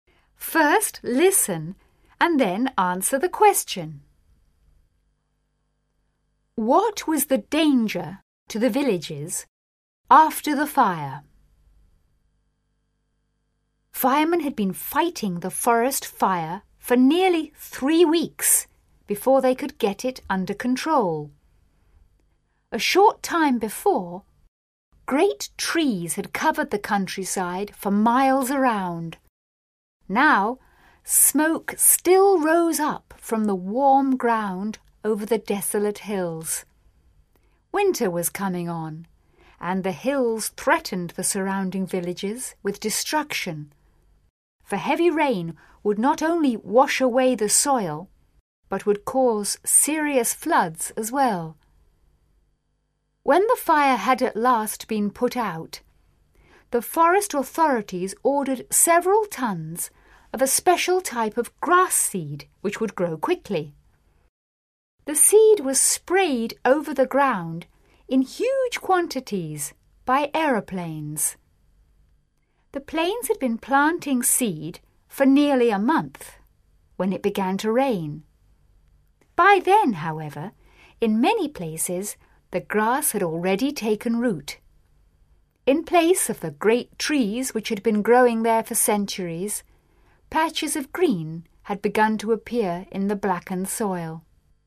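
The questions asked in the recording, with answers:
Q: What was the danger to the villages after the fire?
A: Heavy rain could wash away the soil and cause serious floods.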